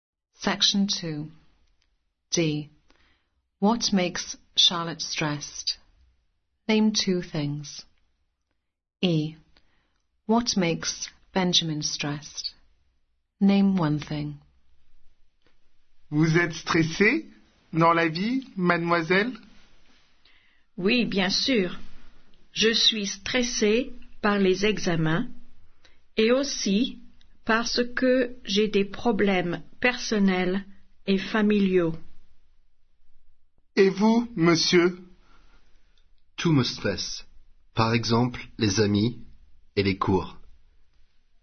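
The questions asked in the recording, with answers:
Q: What makes Charlotte stressed?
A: exams and personal/family problems

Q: What makes Benjamin stressed?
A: friends or lessons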